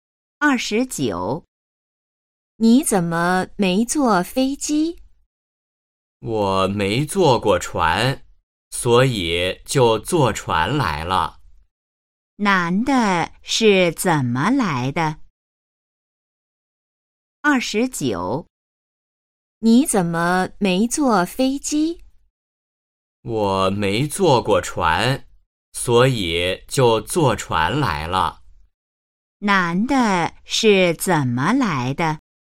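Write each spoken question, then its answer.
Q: 男的是怎么来的?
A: 坐船来的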